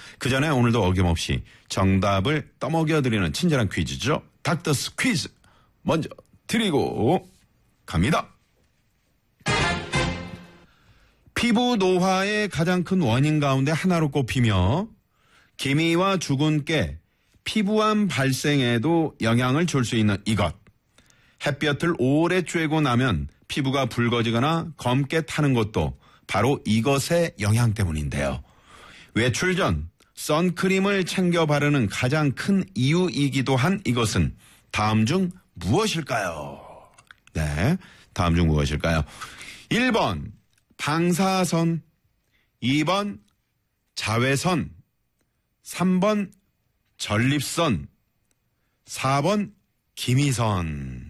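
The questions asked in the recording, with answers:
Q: 외출 전 선크림을 챙겨 바르는 가장 큰 이유이기도 한 이것은 다음 중 무엇일까요?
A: 2번: 자외선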